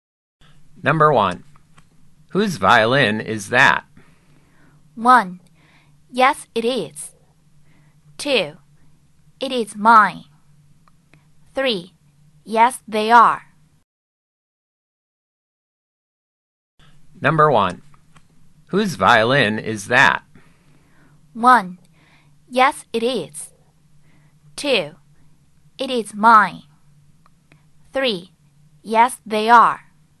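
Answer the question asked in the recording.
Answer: 2: It is mine.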